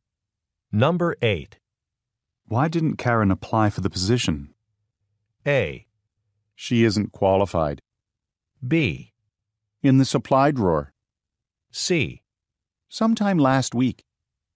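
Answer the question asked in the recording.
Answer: A: She isn't qualified.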